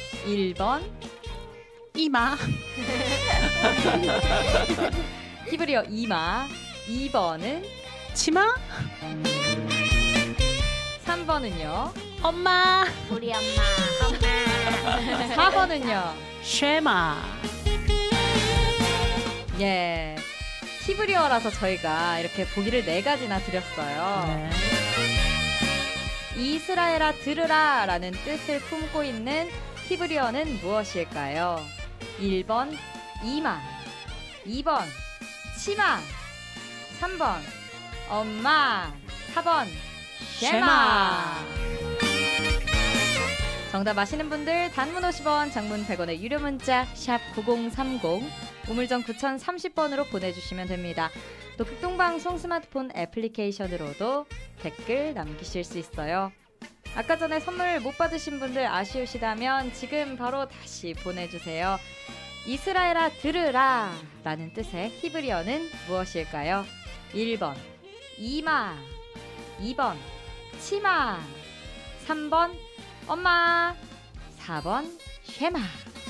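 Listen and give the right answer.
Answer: 4: 쉐마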